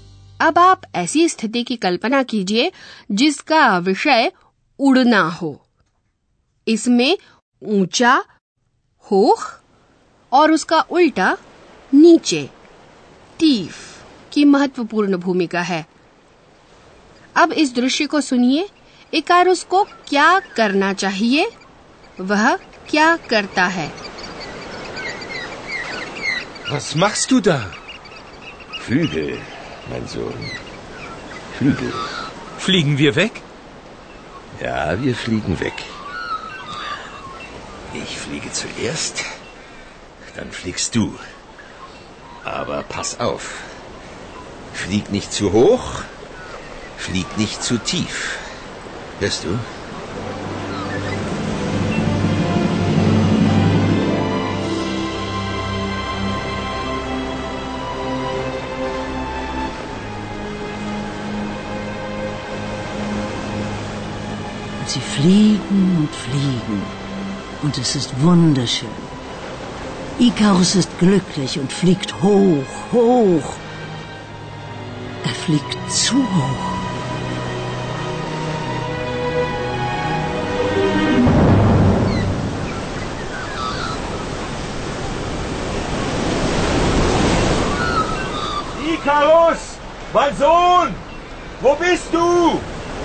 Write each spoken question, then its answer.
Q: Icarus को क्या करना चाहिए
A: Icarus को सावधान रहना चाहिए